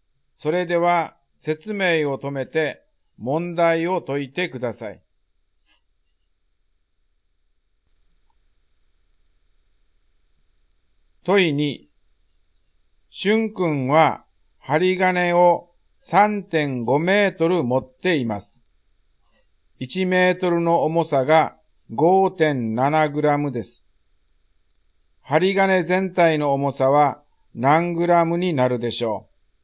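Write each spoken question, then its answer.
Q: 針金全体の重さは何グラムになるでしょう。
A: 19.95グラム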